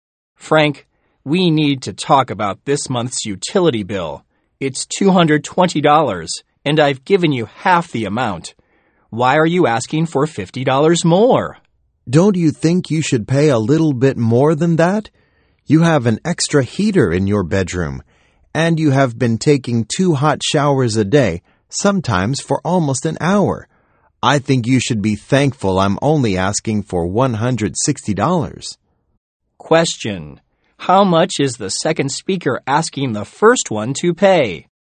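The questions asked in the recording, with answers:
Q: how much is the second speaker asking the first one to pay?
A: $160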